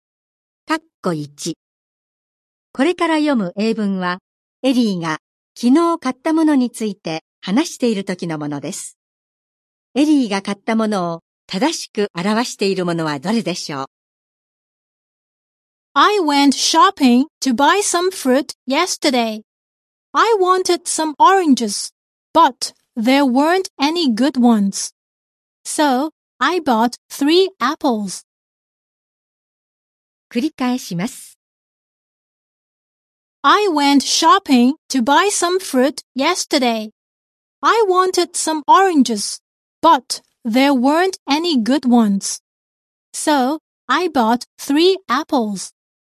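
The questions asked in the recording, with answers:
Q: エリーが買ったものを正しく表しているものはどれでしょう?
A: りんご3個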